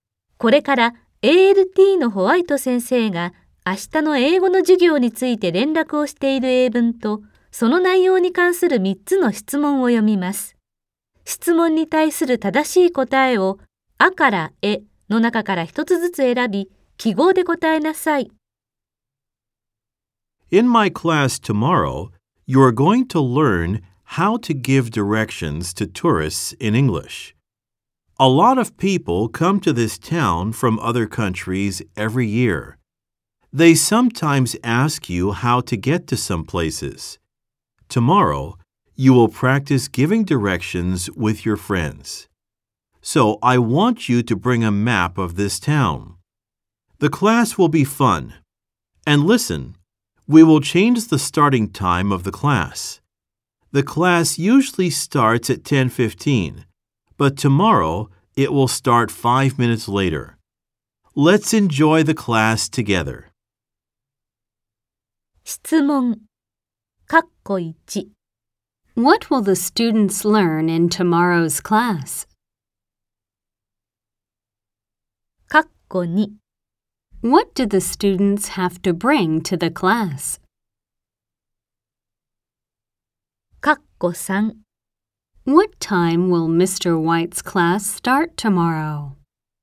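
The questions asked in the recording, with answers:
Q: What will the students learn in tomorrow's class?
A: How to give directions to tourists in English

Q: What do the students have to bring to the class?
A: A map of the town

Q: What time will Mr. White's class start tomorrow?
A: At 10:20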